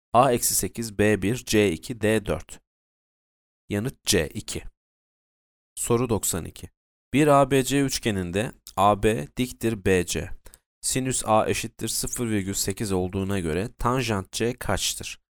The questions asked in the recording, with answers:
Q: Sinüs A eşittir 0,8 olduğuna göre tanjant C kaçtır?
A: B 3 bölü 4.